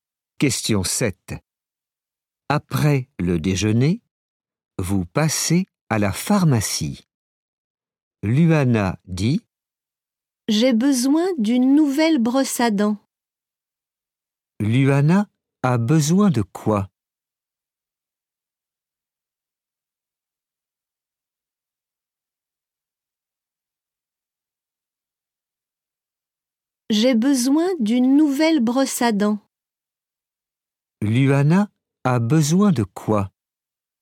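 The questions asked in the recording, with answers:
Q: Luana a besoin de quoi ?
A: D'une brosse à dents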